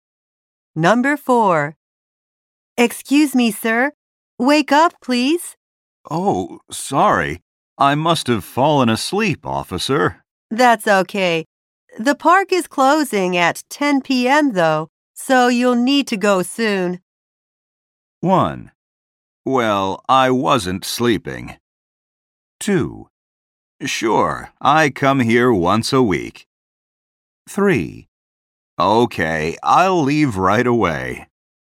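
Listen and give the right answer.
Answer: 3: Okay, I'll leave right away.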